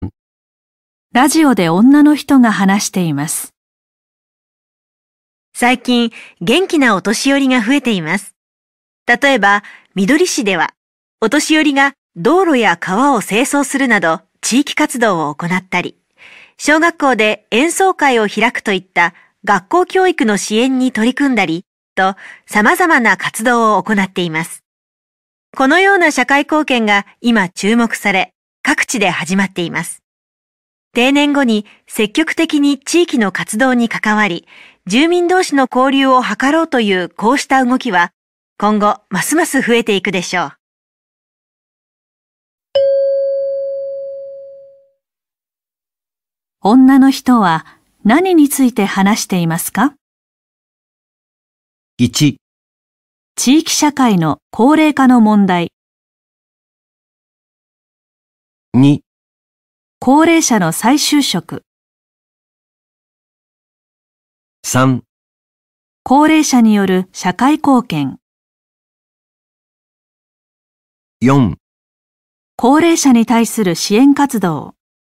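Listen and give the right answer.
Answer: 3: 高齢者による社会貢献。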